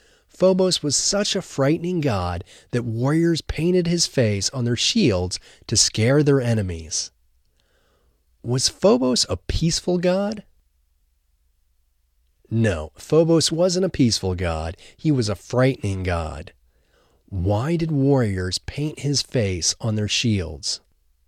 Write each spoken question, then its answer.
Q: Why did warriors paint his face on their shields?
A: Warriors painted his face on their shields to scare their enemies.